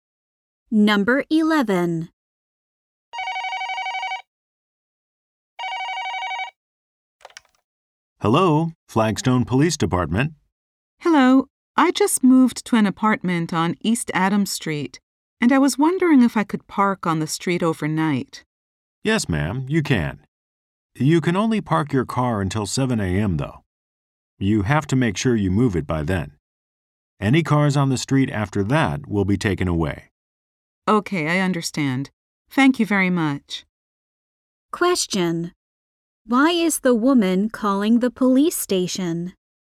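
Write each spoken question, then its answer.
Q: Why is the woman calling the police station?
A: To ask if she can park on the street overnight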